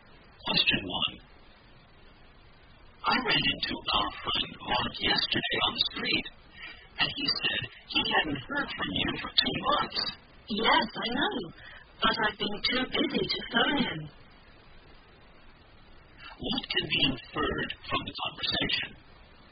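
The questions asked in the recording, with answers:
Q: What can be inferred from the conversation?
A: She hasn't contacted Mark for two months because she's been too busy.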